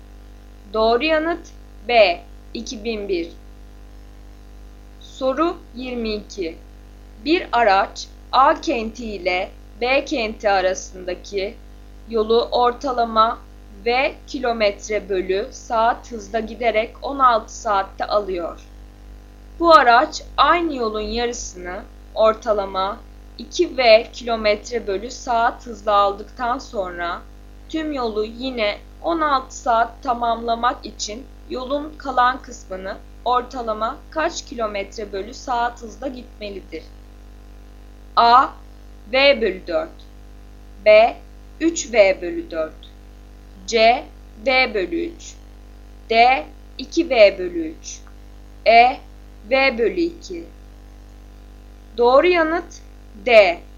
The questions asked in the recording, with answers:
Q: Bu araç aynı yolun yarısını ortalama 2V kilometre bölü saat hızla aldıktan sonra tüm yolu yine 16 saat tamamlamak için yolun kalan kısmını ortalama kaç kilometre bölü saat hızla gitmelidir?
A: Doğru yanıt D. 2V bölü 3.